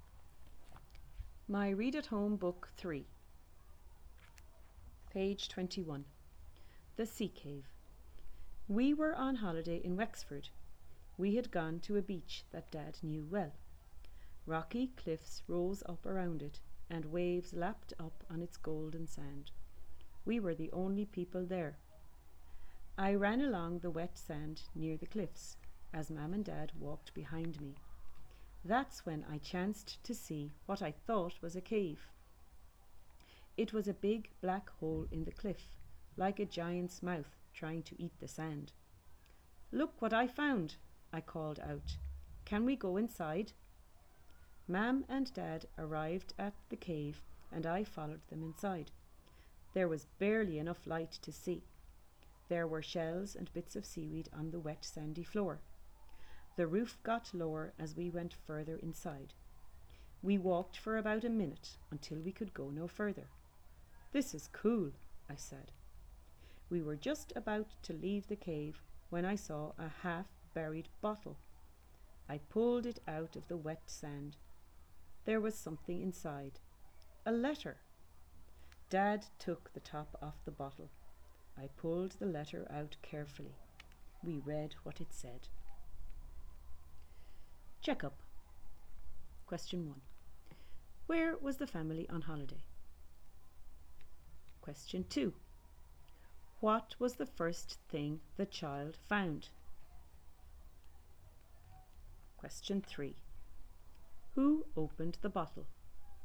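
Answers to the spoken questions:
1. In Wexford
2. A cave
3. Dad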